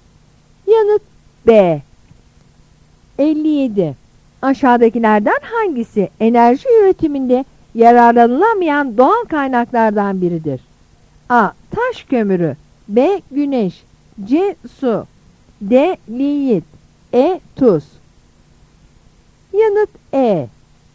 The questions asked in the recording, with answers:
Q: Aşağıdakilerden hangisi enerji üretiminde yararlanılamayan doğal kaynaklardan biridir?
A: Yanıt E.